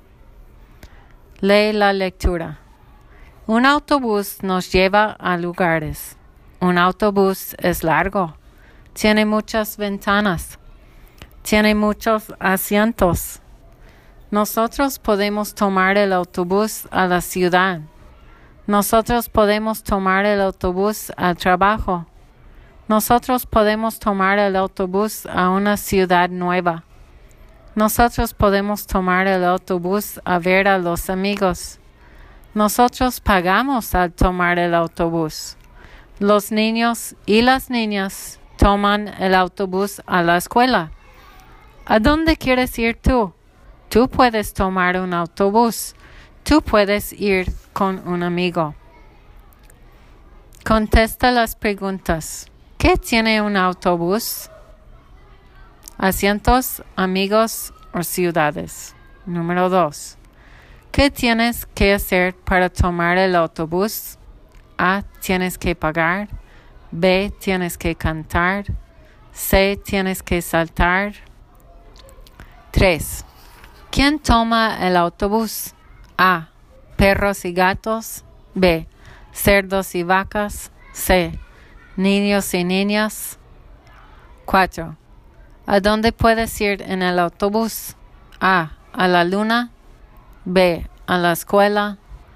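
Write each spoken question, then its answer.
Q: ¿Qué tiene un autobús?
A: Asientos

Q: ¿Qué tienes que hacer para tomar el autobús?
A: A: Tienes que pagar.

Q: ¿Quién toma el autobús?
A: C: Niños y niñas.

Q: ¿A dónde puedes ir en el autobús?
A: B: A la escuela.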